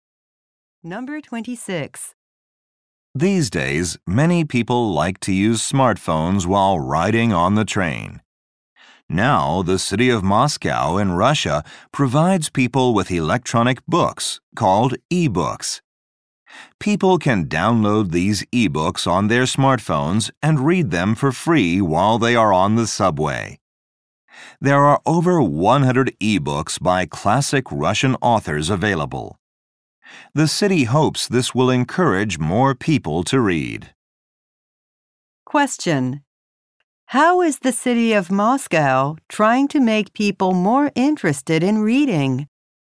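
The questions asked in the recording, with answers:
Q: how is the city of Moscow trying to make people more interested in reading?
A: By providing free e-books to read on the subway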